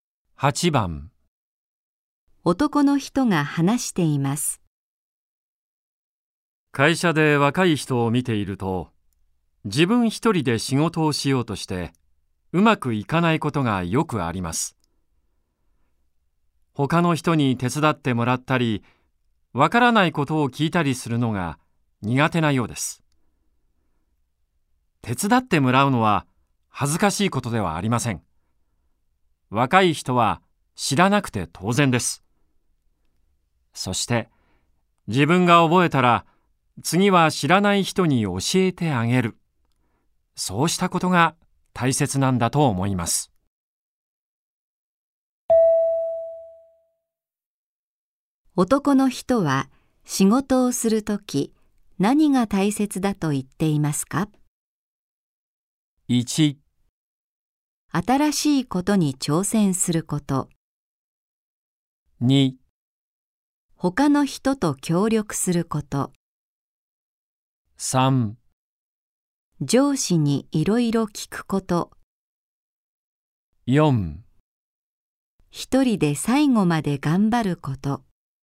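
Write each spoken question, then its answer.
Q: 男の人は仕事をするとき、何が大切だと言っていますか?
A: 2: 他の人と協力すること。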